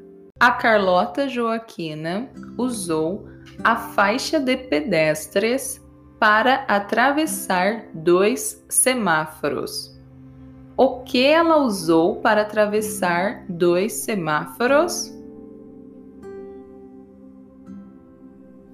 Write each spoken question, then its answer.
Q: O que ela usou para atravessar dois semáforos?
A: A faixa de pedestres. Ela usou a faixa de pedestres para atravessar dois semáforos.